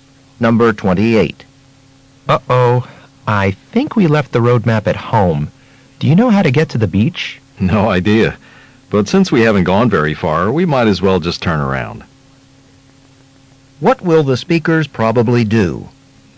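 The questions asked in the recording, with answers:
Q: What will the speakers probably do?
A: Go back home for the map.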